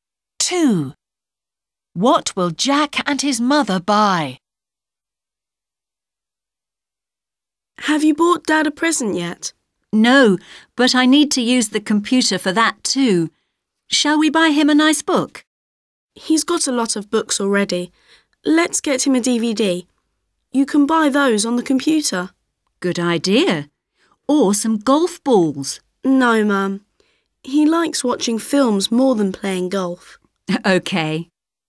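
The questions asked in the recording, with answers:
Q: What will Jack and his mother buy?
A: a DVD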